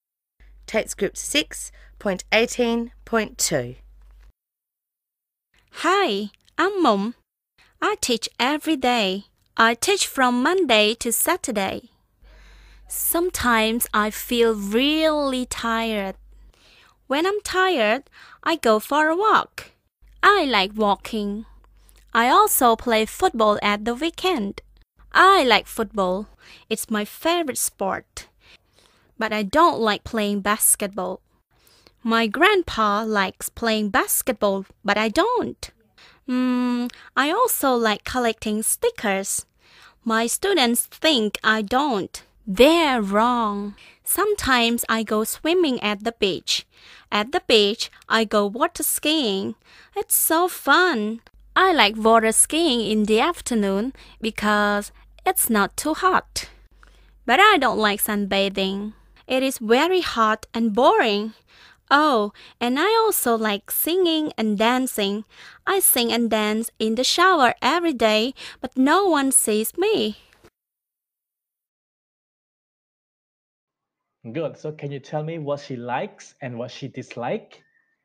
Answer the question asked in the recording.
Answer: sunbathing, no, water skiing, yes, singing, yes, dancing, yes, go for a walk, yes, basketball, lên cái là basketball, ball cái hạt ball bóng nữa, no, playing football, yes, collecting sticker, yes